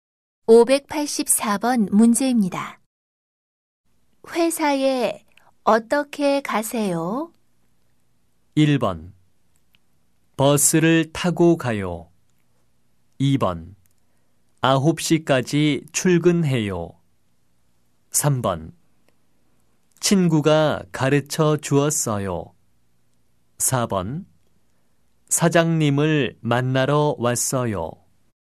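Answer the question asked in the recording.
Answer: 1: 버스를 타고 가요.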